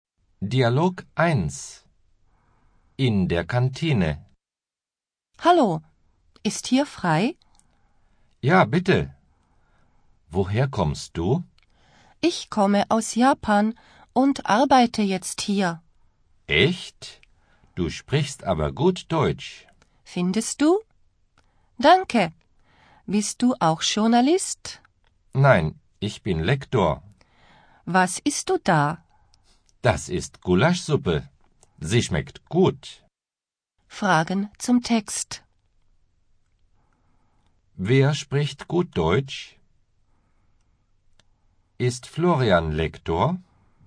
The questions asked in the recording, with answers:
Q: Wer spricht gut Deutsch?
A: Du sprichst aber gut Deutsch.